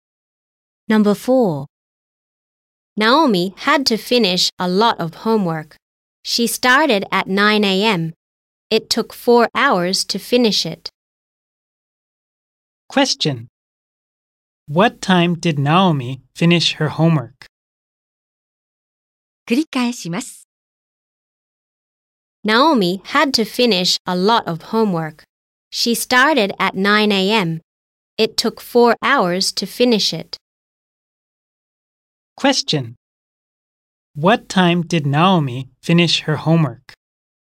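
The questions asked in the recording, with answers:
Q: What time did Naomi finish her homework?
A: At 1 p.m.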